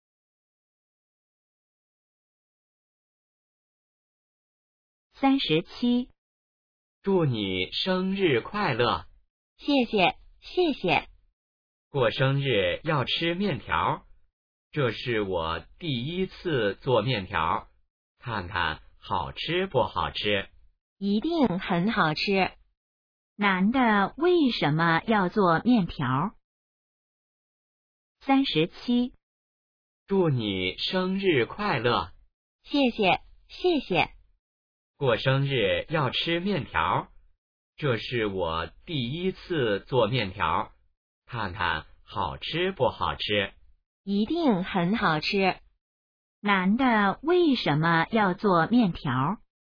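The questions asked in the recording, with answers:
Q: 男的为什么要做面条?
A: 女的过生日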